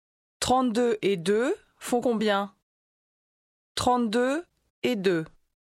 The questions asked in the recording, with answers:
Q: 32 et 2 font combien?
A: 34.